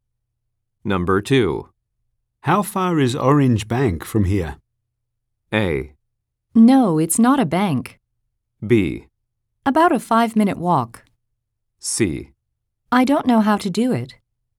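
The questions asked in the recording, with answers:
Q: How far is Orange Bank from here?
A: B: About a 5-minute walk.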